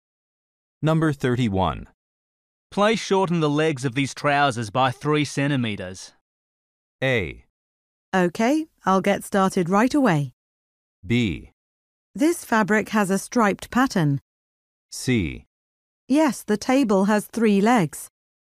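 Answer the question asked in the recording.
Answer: A: Okay, I'll get started right away.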